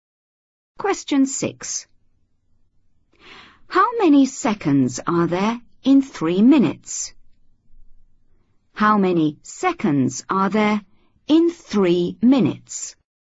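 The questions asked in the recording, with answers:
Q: How many seconds are there in 3 minutes?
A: 180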